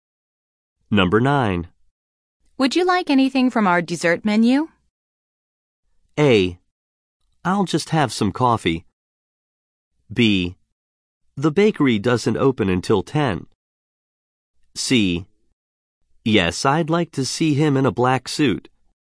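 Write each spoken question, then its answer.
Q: Would you like anything from our dessert menu?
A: A: I'll just have some coffee.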